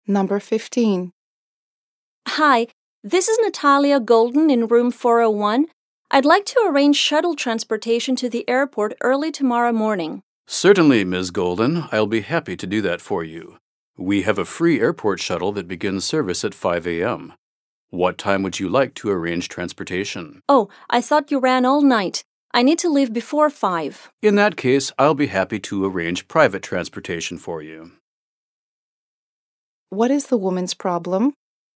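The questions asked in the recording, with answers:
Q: What is the woman's problem?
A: She needs to leave for the airport before 5 a.m., but the free shuttle doesn't start until 5 a.m.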